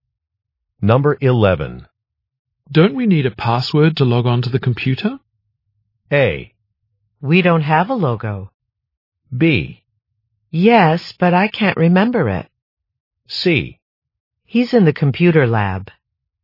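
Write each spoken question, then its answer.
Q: Don't we need a password to log on to the computer?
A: B: Yes, but I can't remember it.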